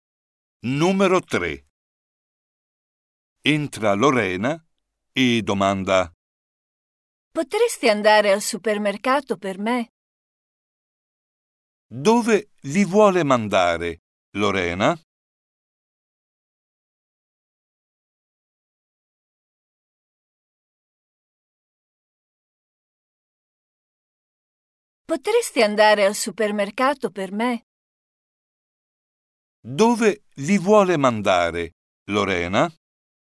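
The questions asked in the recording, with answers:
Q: Dove vi vuole mandare, Lorena?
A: al supermercato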